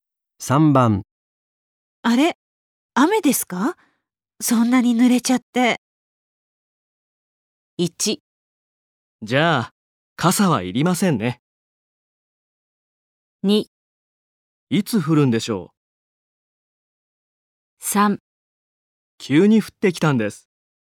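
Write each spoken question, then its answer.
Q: あれ、雨ですか?そんなに濡れちゃって。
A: 3: 急に降ってきたんです。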